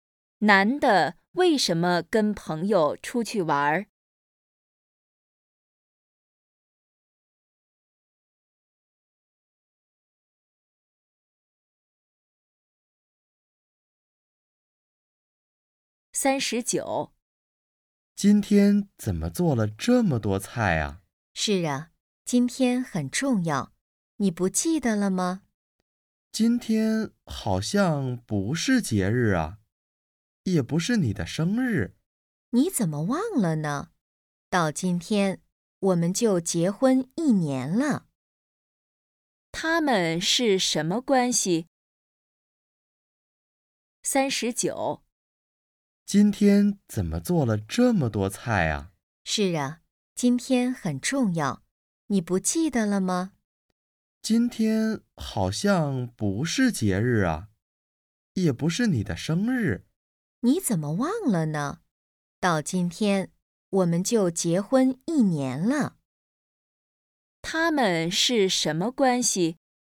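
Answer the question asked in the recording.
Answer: 夫妻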